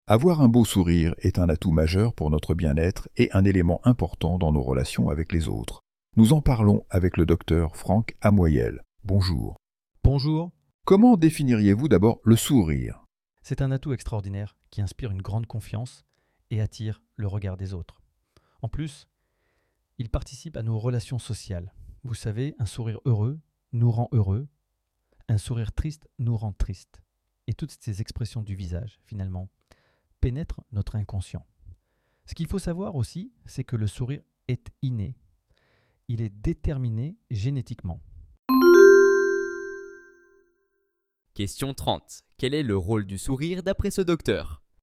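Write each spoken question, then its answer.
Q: Quel est le rôle du sourire d'après ce docteur ?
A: Il inspire confiance, attire le regard des autres et participe aux relations sociales.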